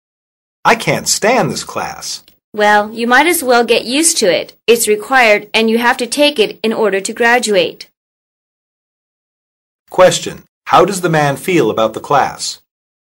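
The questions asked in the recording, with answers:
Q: How does the man feel about the class?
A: He dislikes it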